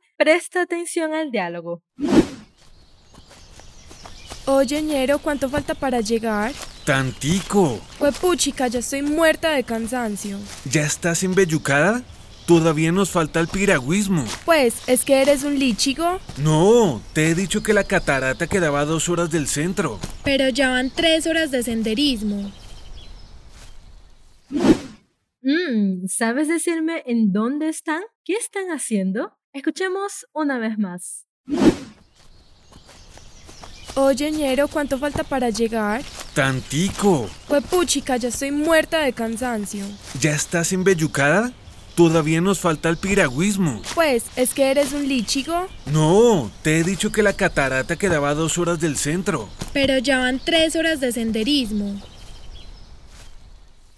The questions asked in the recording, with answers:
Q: ¿Qué están haciendo?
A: Ellos están haciendo un senderismo.